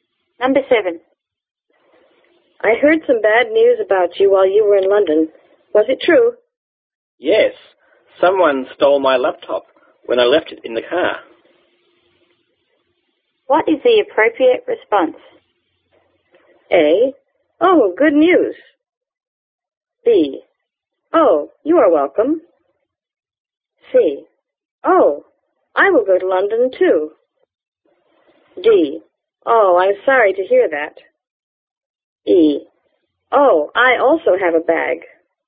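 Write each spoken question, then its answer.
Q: What is the appropriate response?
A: D: Oh, I'm sorry to hear that.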